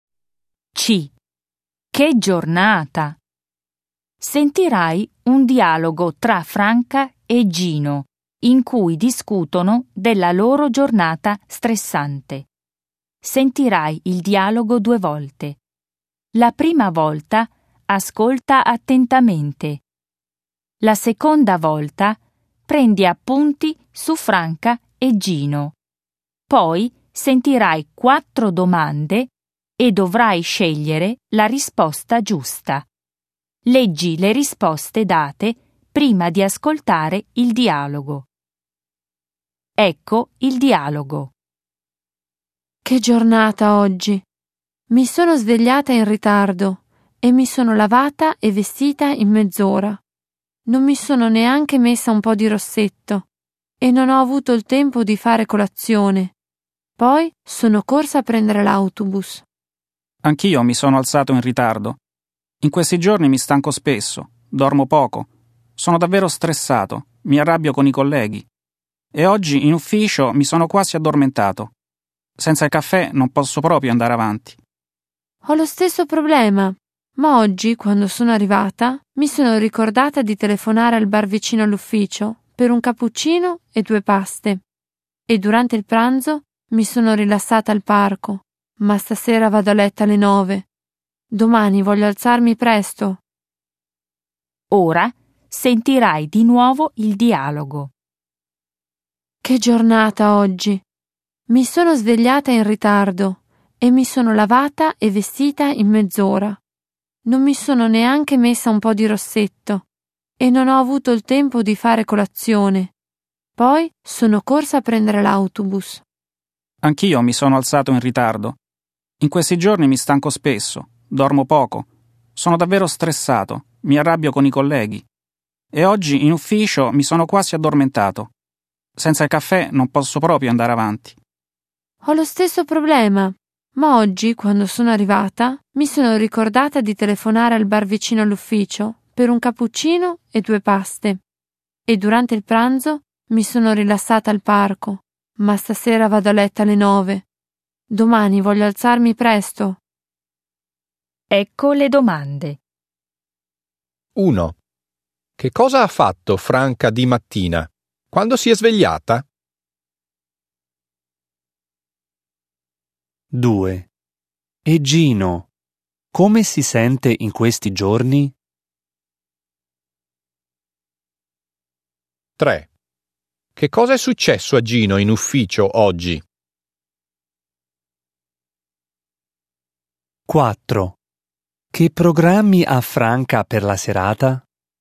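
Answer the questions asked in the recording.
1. Si è svegliata in ritardo e si è lavata e vestita in mezz'ora
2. Stanco e stressato
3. Si è quasi addormentato
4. Andare a letto alle 9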